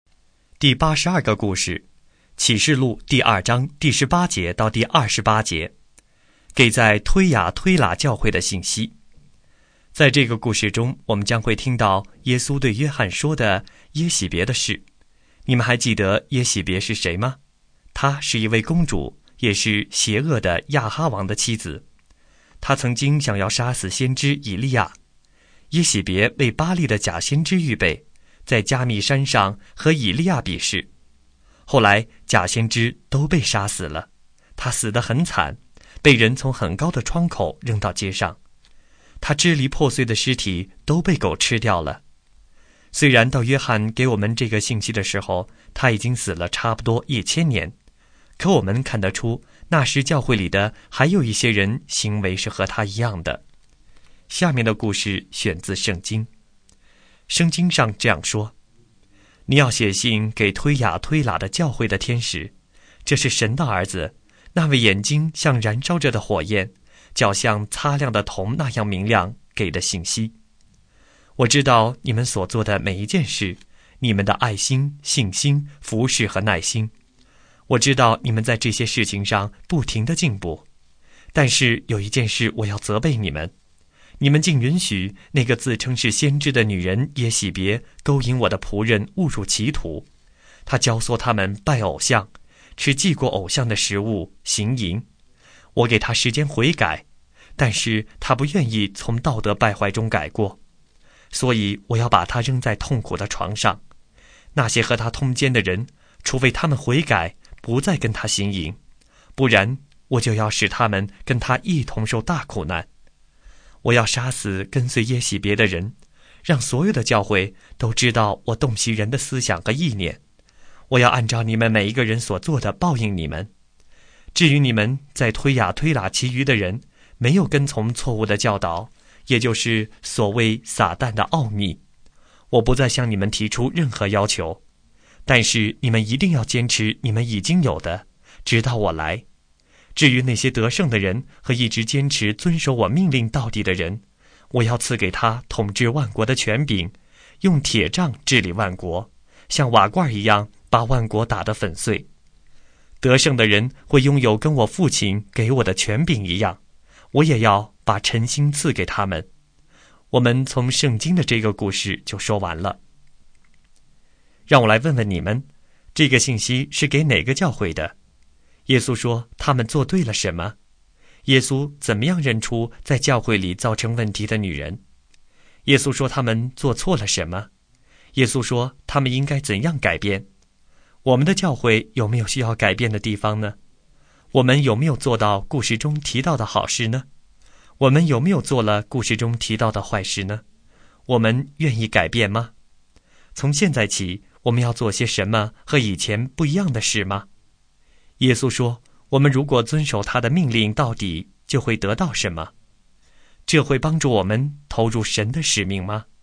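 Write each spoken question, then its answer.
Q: 这个信息是给哪个教会的?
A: 推雅推拉的教会

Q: 耶稣说他们做对了什么?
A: 他们的爱心、信心、服侍和耐心,并且不停地进步

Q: 耶稣说他们做错了什么?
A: 允许耶洗别勾引他的仆人拜偶像、吃祭过偶像的食物、行淫

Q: 耶稣说,我们如果遵守他的命令到底,就会得到什么?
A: 统治万国的权柄和晨星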